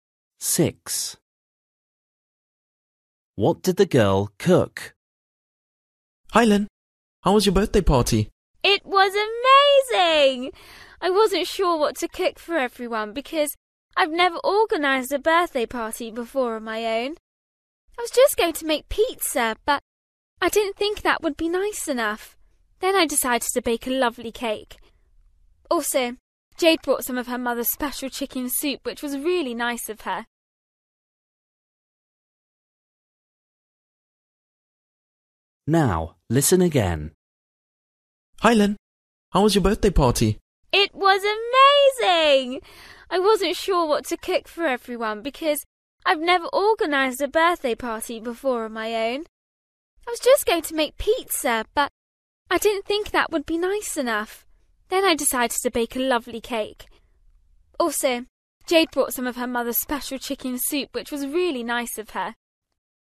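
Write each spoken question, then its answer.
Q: What did the girl cook?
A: a cake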